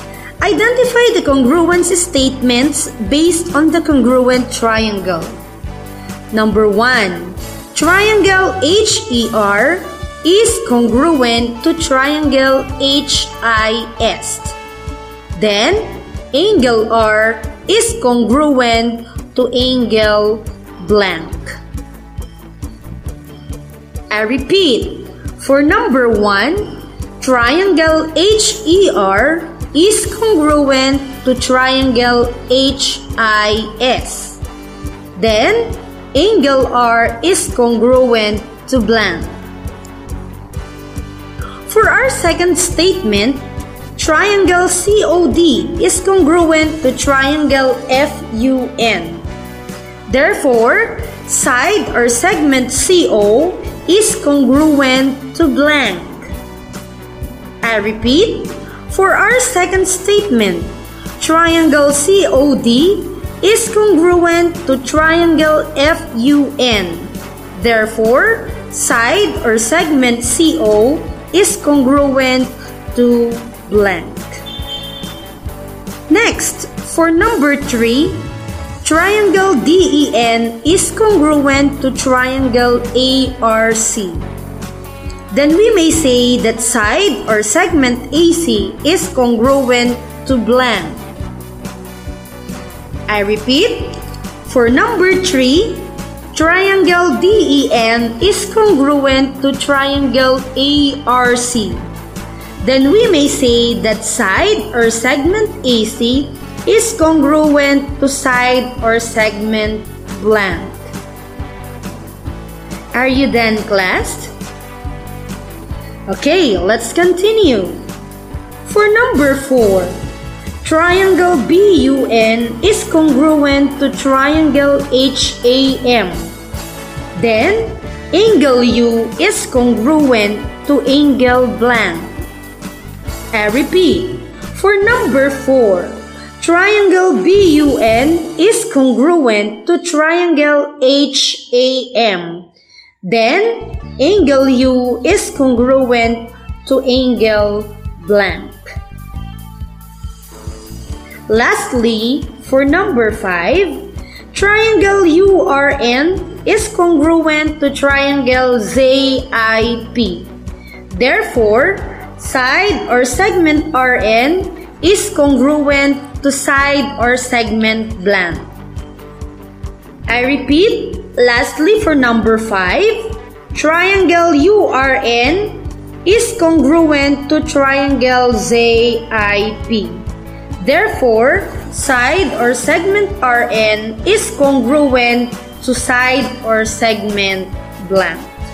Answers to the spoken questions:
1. Very good. The correct answer is angle est.
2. The answer is side or segment FU.
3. Exactly. The correct answer is side or segment DN.
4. Very good. The answer is angle A.
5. Correct. The answer is side or segment IP.